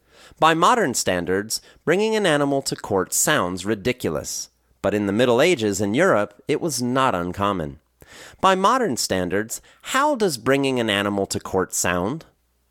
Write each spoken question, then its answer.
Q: By modern standards, how does bringing an animal to court sound?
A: By modern standards, bringing an animal to court sounds ridiculous.